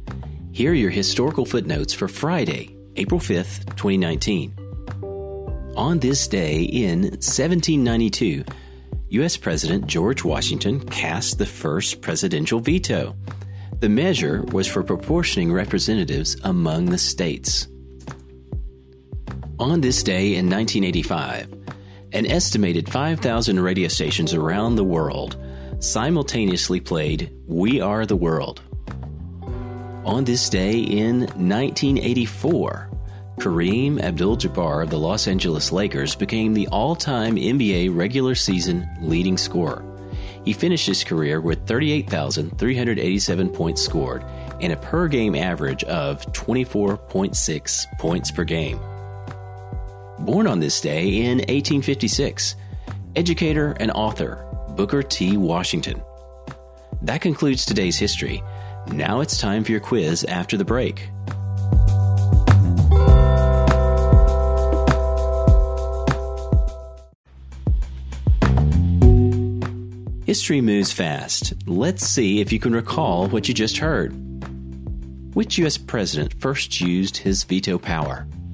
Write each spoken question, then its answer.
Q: Which U.S. president first used his veto power?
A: The answer? George Washington.